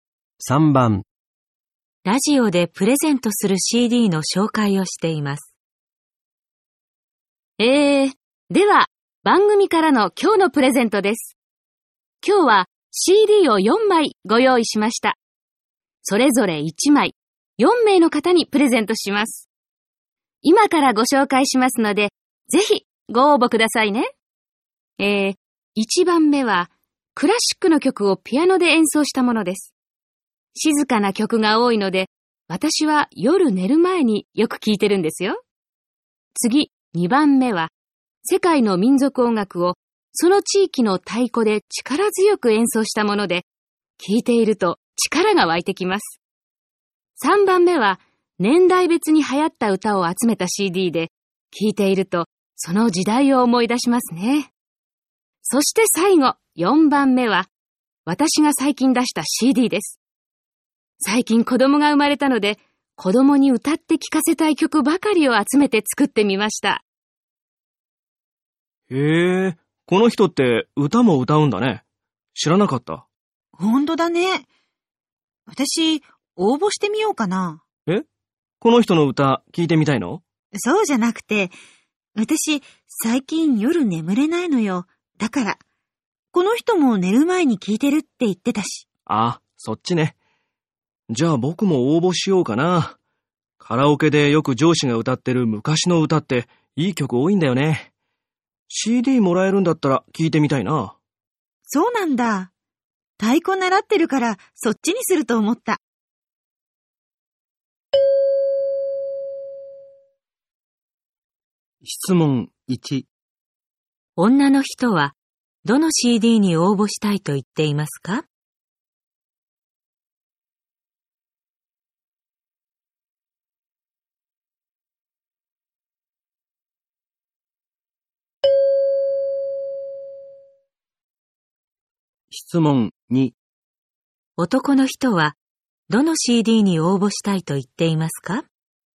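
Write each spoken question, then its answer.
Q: 女の人は どの CD に応募したいと言っていますか?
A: 1番目のクラシックのピアノのCD

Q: 男の人はどの CD に応募したいと言っていますか?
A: 3番目の年代別に流行った歌のCD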